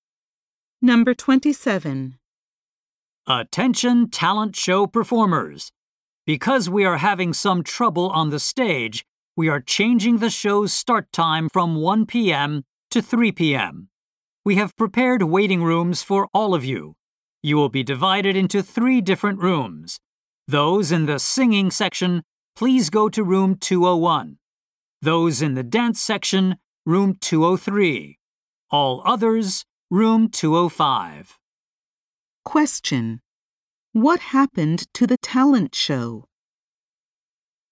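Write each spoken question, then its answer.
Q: What happened to the talent show?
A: Its start time was changed from 1 p.m. to 3 p.m.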